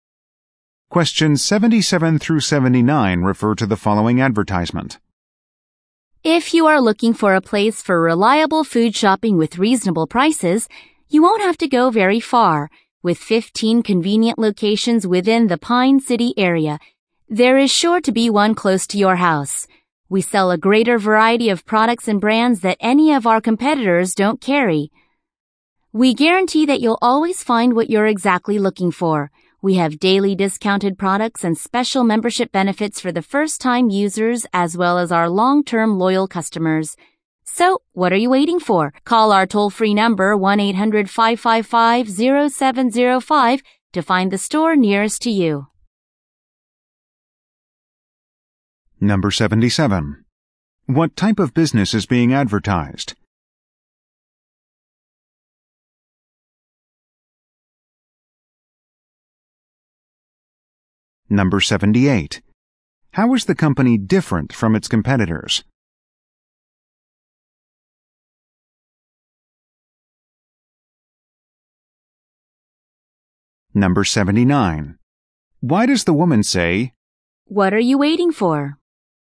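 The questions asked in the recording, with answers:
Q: What type of business is being advertised?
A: A food store (supermarket)

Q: How is the company different from its competitors?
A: It sells products and brands competitors don't carry

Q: Why does the woman say,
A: To encourage listeners to call now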